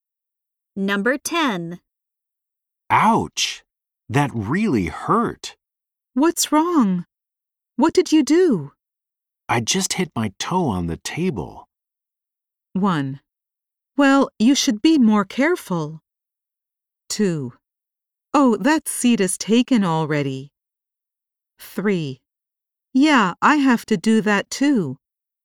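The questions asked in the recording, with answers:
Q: I just hit my toe on the table.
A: 1: Well, you should be more careful.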